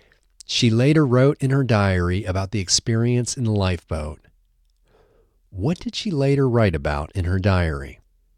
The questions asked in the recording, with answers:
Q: What did she later write about in her diary?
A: She later wrote about the experience in the lifeboat.